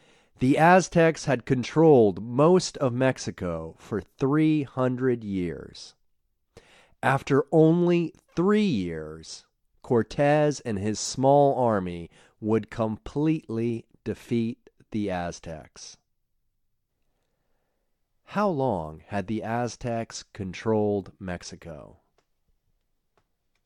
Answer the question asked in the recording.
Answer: They had controlled Mexico for 300 years.